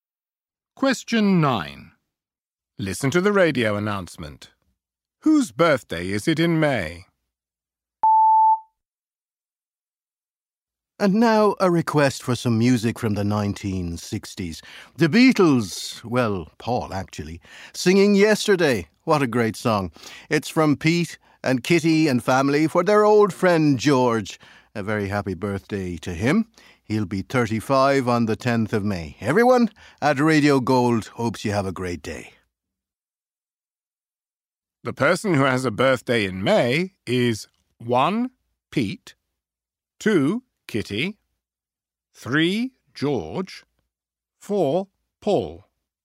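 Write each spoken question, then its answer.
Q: Whose birthday is it in May?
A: 3: George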